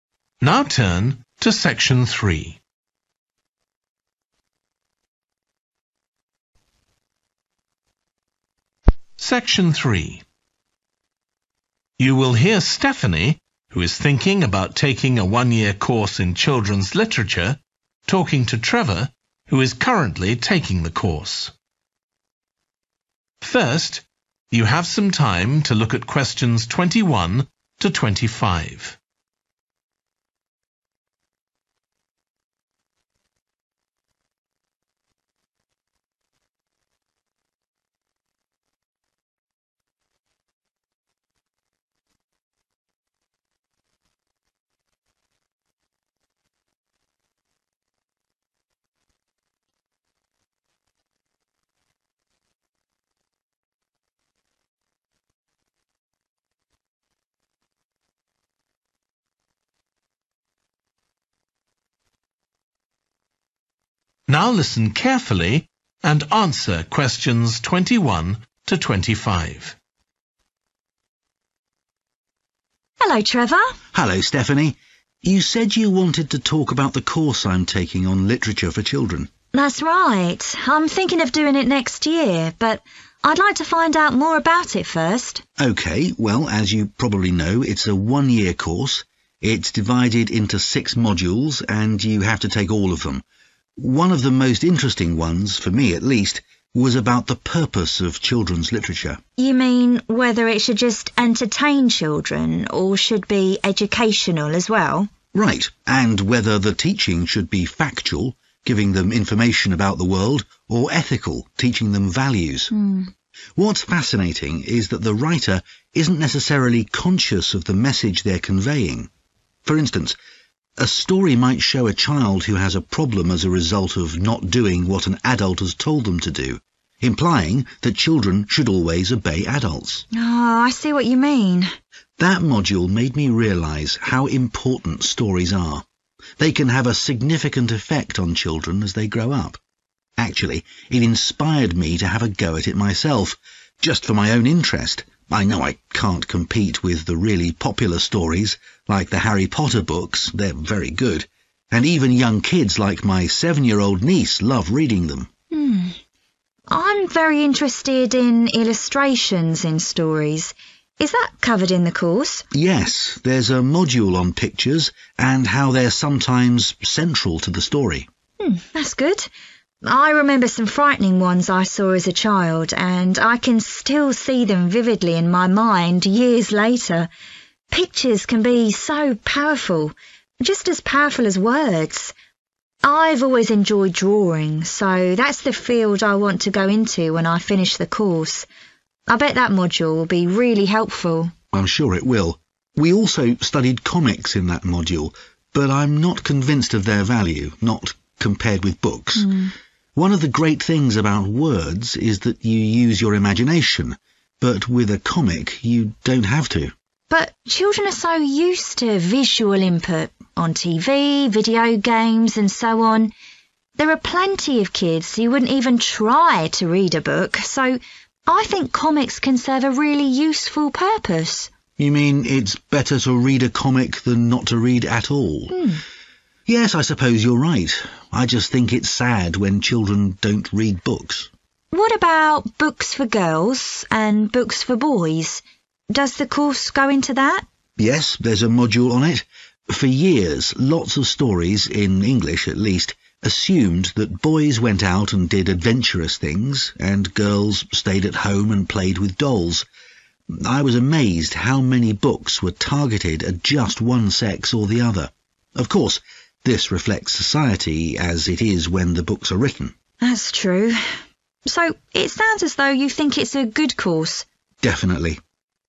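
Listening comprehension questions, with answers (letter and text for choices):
Choose the correct letter A, B or C.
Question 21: What does Trevor find interesting about the purpose of children's literature?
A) the fact that authors may not realise what values they're teaching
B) the fact that literature can be entertaining and educational at the same time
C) the fact that adults expect children to imitate characters in literature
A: A) the fact that authors may not realise what values they're teaching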